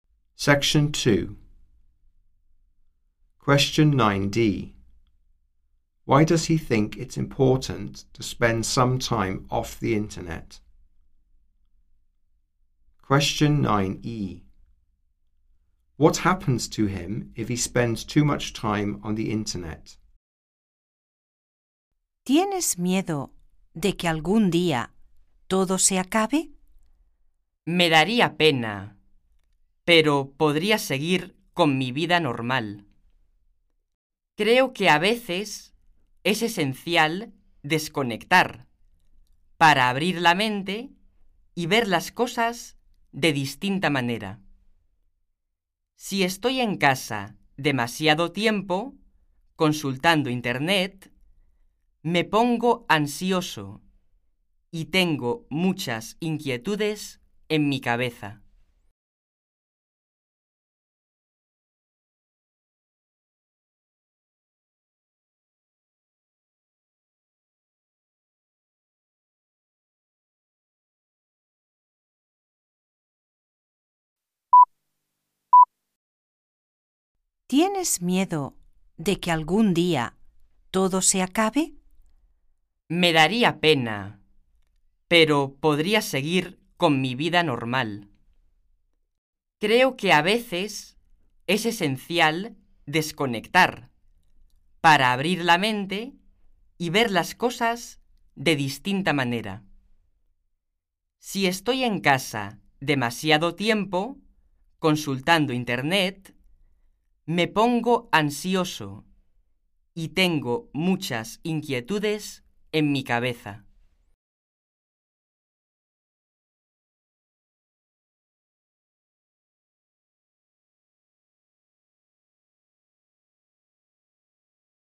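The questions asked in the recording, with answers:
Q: Why does he think it's important to spend some time off the internet?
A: To open your mind and see things differently

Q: What happens to him if he spends too much time on the internet?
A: He gets anxious and has many worries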